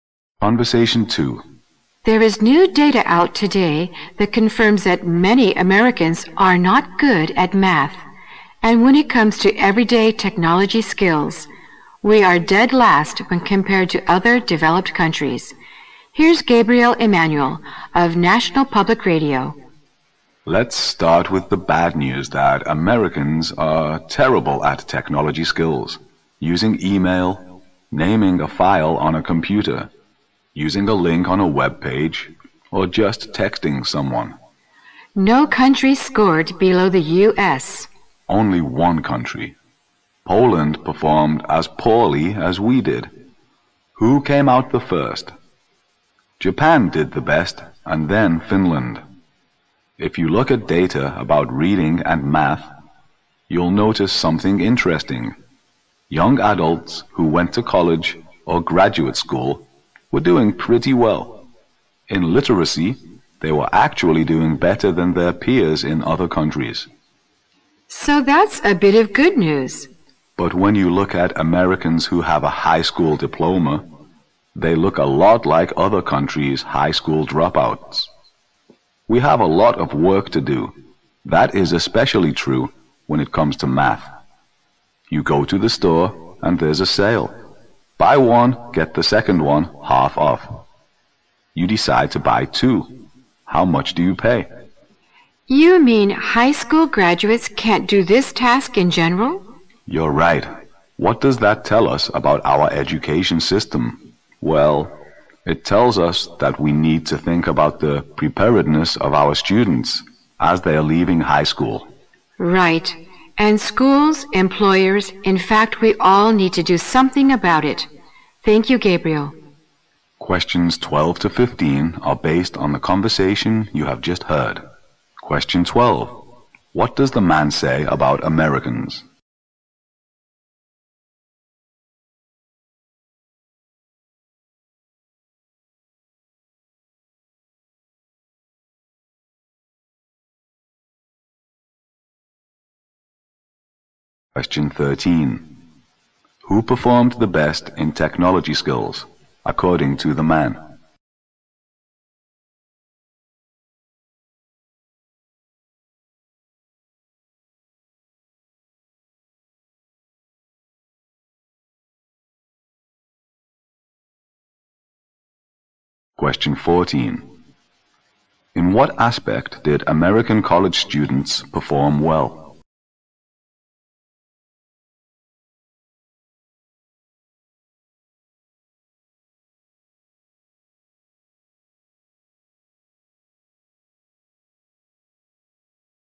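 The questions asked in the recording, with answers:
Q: What does the man say about Americans?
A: They are terrible at technology skills (ranked last)

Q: Who performed the best in technology skills, according to the man?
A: Japan

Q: In what aspect did American college students perform well?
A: Literacy

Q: What do we learn from the conversation about American high school education?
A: It doesn't prepare students well; graduates are like other countries' dropouts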